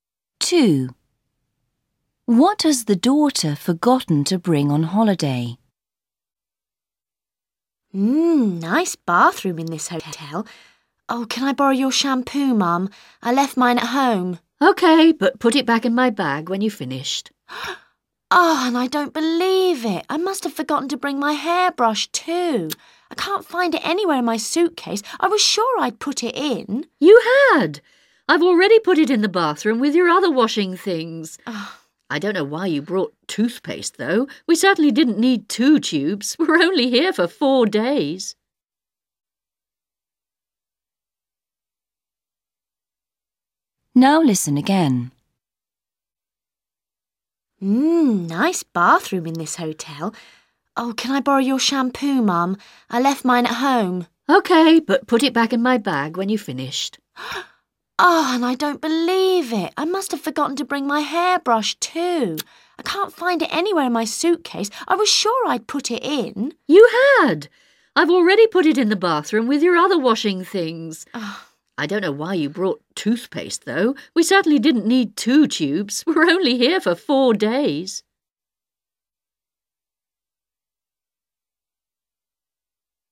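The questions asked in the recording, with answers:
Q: What has the daughter forgotten to bring on holiday?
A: Shampoo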